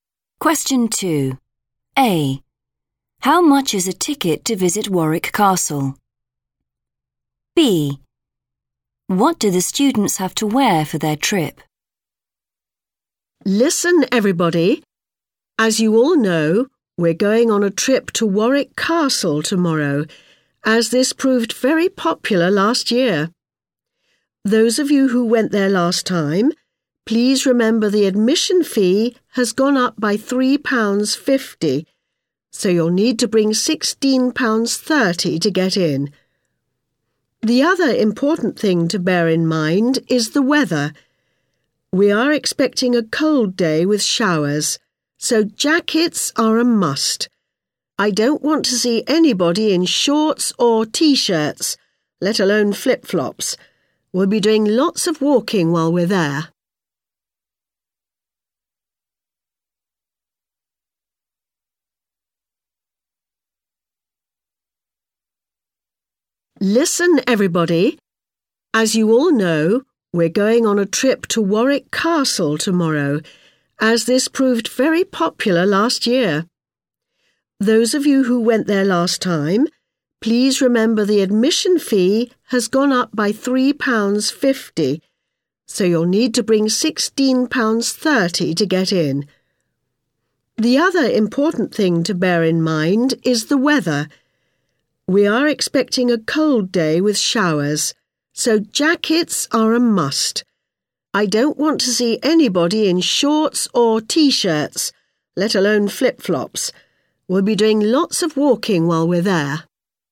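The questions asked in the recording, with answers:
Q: How much is a ticket to visit Warwick Castle?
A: £16.30

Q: What do the students have to wear for their trip?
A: Jackets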